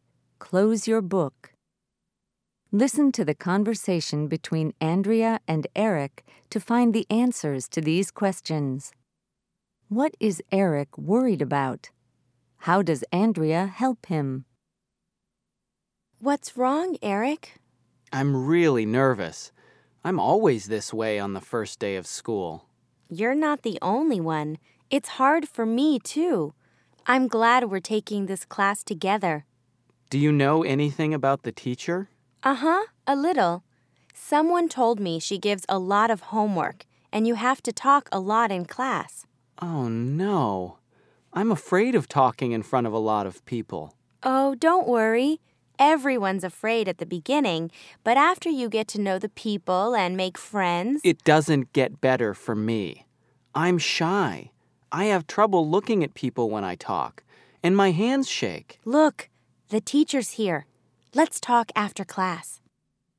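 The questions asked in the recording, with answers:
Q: What is Eric worried about?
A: Talking in front of a lot of people in class (first day of school)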